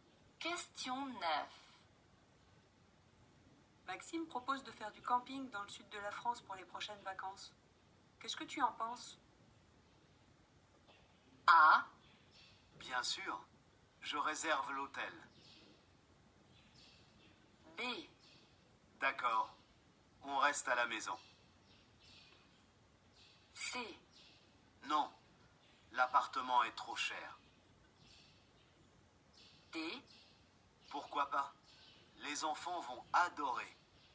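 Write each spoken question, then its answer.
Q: Qu'est-ce que tu en penses?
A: D: Pourquoi pas? Les enfants vont adorer.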